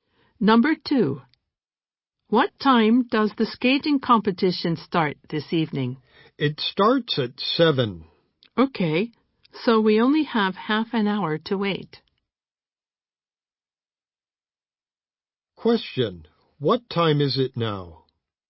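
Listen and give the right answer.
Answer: 6:30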